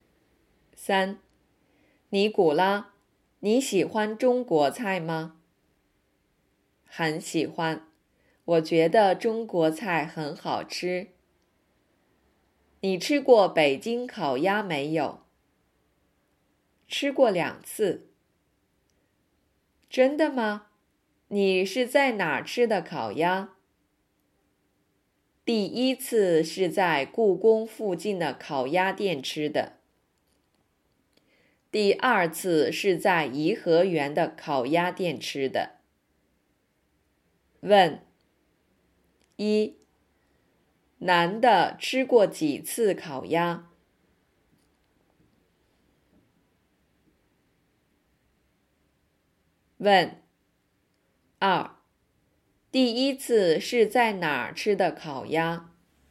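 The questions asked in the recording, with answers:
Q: 男的吃过几次烤鸭?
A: 两次

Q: 第一次是在哪儿吃的烤鸭?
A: 故宫附近的烤鸭店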